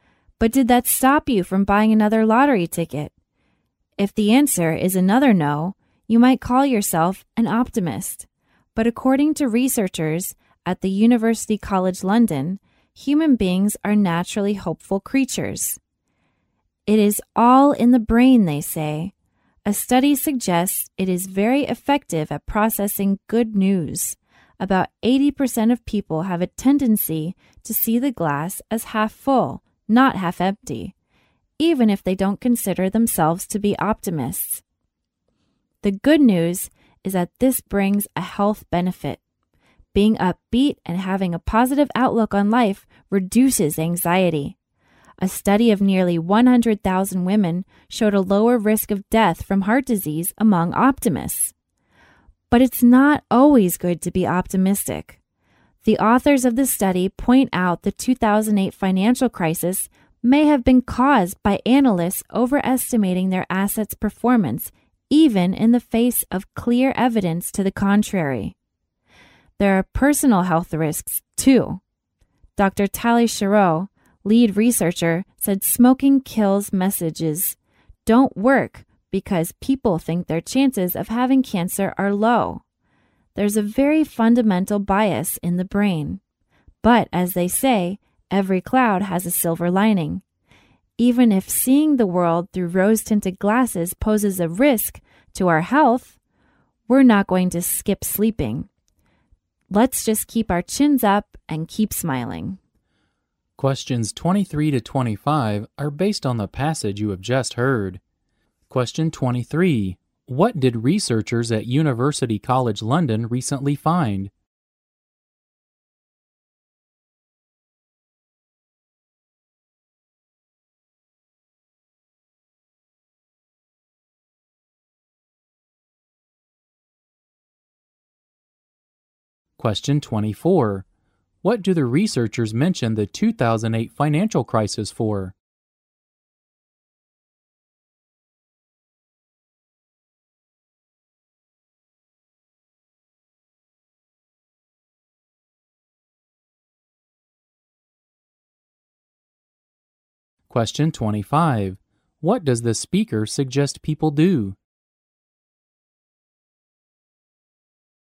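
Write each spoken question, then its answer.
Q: What did researchers at University College London recently find?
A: Human beings are naturally hopeful/optimistic; the brain is very effective at processing good news.

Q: What do the researchers mention the 2008 financial crisis for?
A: To show that being optimistic is not always good; analysts overestimated their assets' performance.

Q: What does the speaker suggest people do?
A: Keep their chins up and keep smiling (stay optimistic).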